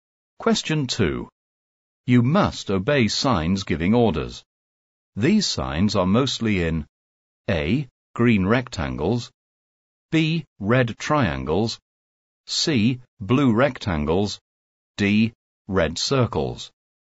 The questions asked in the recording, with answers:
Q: You must obey signs giving orders. These signs are mostly in A.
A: The correct answer is D red circles.